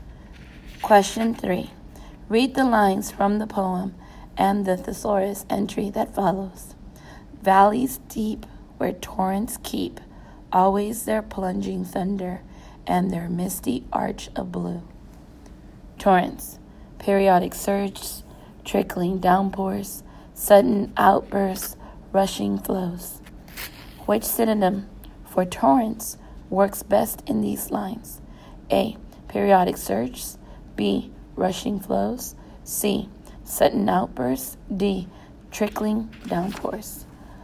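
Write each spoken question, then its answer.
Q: Which synonym for torrents works best in these lines?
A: B: Rushing flows.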